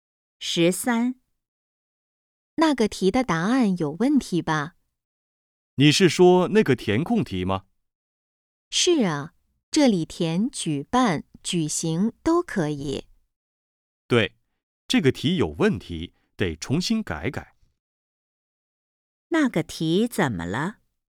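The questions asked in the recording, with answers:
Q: 那个题怎么了?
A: 答案有问题,得重新改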